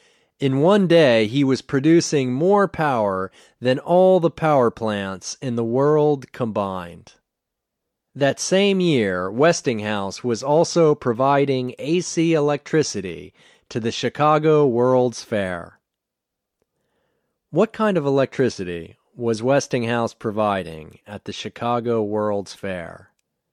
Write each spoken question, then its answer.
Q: What kind of electricity was Westinghouse providing at the Chicago World's Fair?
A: he was providing AC electricity to the Chicago World's Fair.